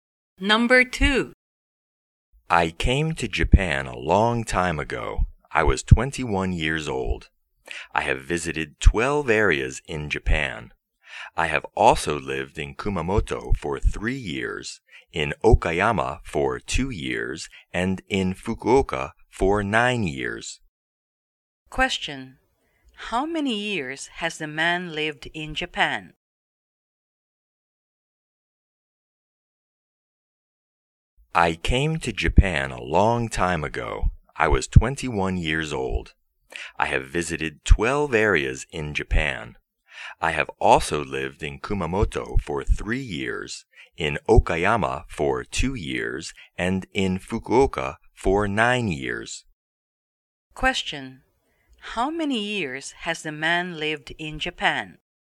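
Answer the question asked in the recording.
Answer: 14 years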